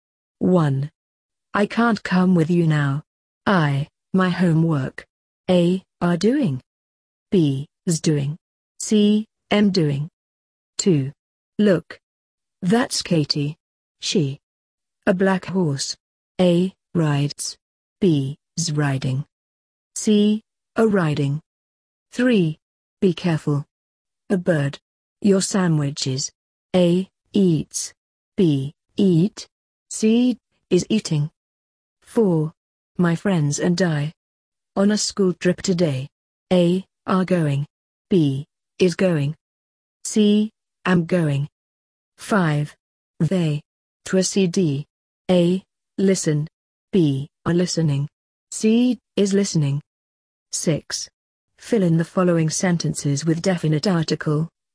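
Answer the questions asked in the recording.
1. C: Am doing
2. B: Is riding
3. C: Is eating
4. A: Are going
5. B: Are listening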